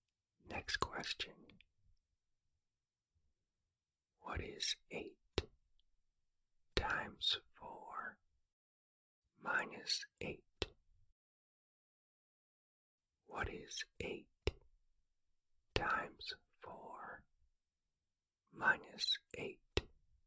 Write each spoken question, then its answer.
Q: What is 8 times 4 minus 8?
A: The answer is 24.